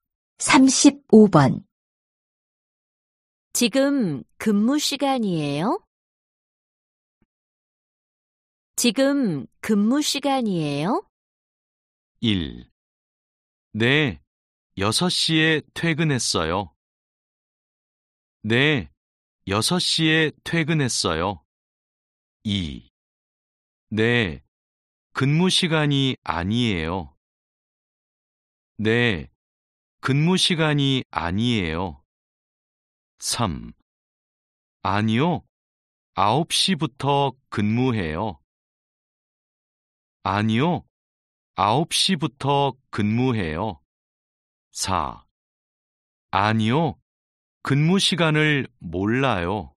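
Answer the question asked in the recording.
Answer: 3: 아니요, 9시부터 근무해요.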